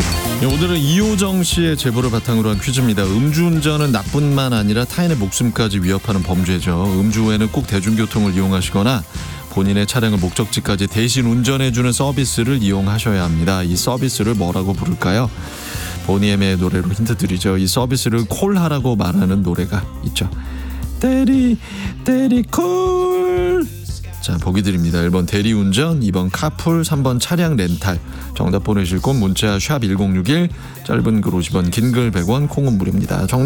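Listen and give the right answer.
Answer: 1: 대리운전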